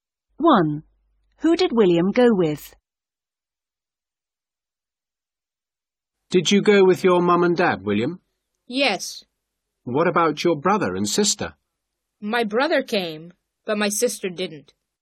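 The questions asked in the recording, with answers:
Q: Who did William go with?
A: His mum, dad and brother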